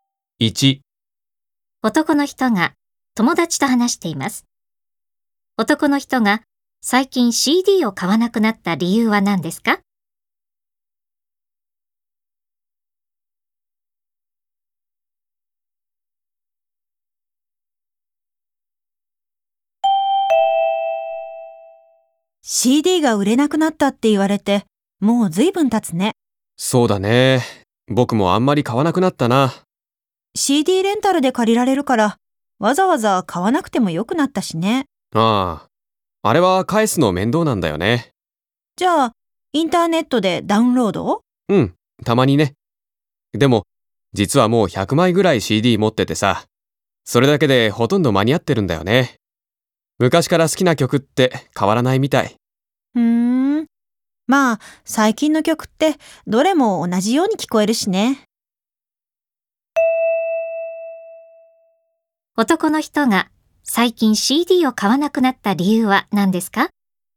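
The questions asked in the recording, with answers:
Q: 男の人が最近 CD を買わなくなった理由は何ですか?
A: もう持っているCDだけでほとんど間に合っているから(好きな曲が昔から変わらない)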